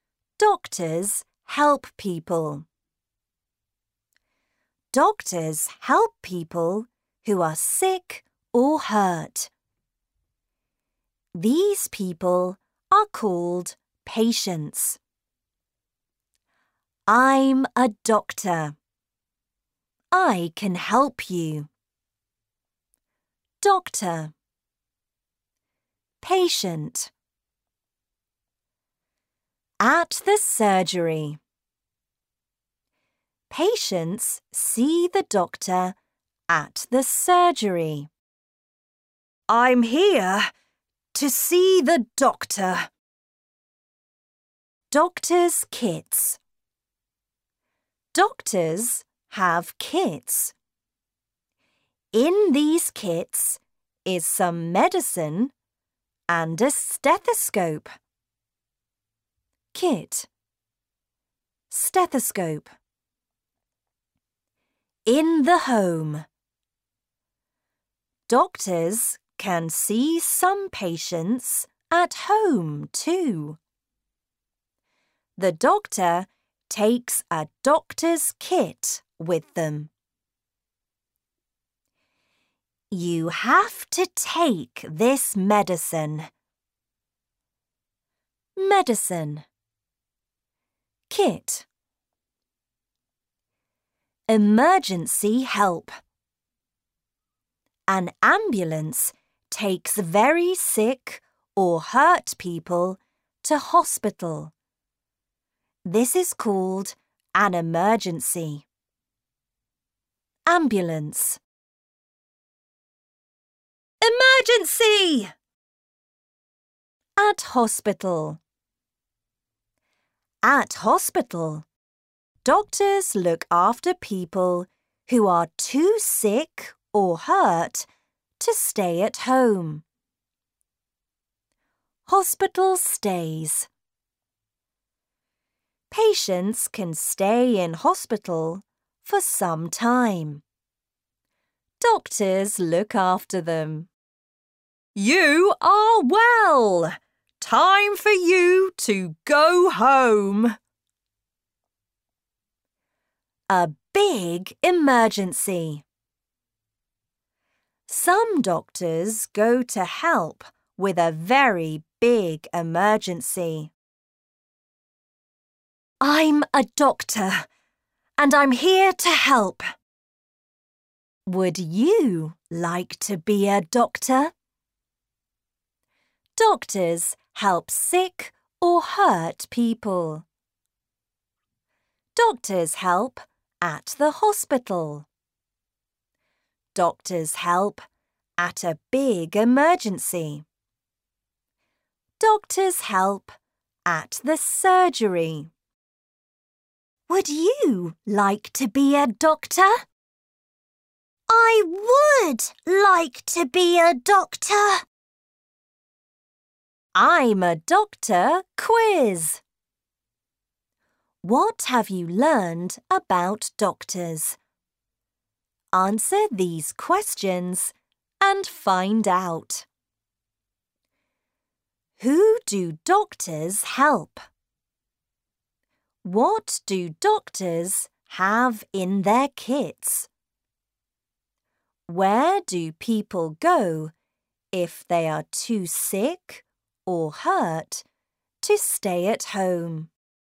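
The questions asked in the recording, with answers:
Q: Who do doctors help?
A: People who are sick or hurt

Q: What do doctors have in their kits?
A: Some medicine and a stethoscope

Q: Where do people go if they are too sick or hurt to stay at home?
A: Hospital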